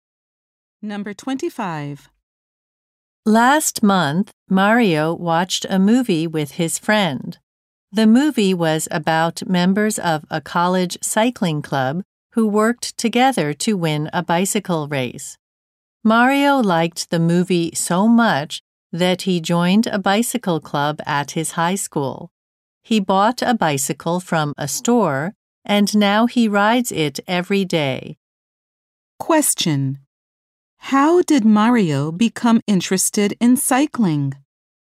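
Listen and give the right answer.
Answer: He watched a movie about a cycling club.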